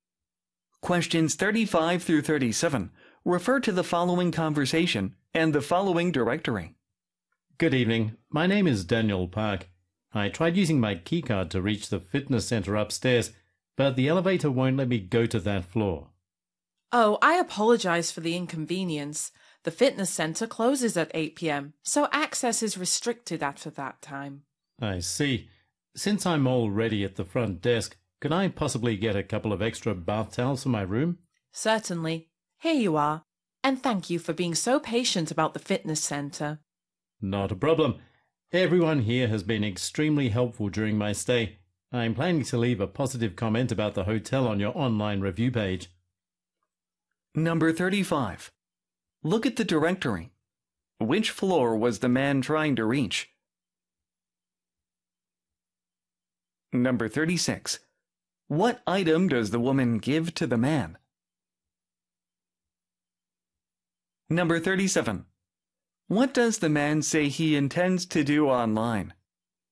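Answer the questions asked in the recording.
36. Extra bath towels
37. Leave a positive review of the hotel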